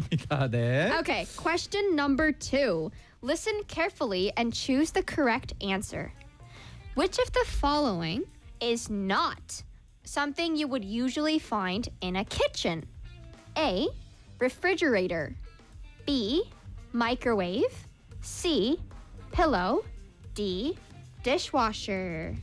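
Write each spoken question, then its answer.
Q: Which of the following is not something you would usually find in a kitchen?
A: C: Pillow.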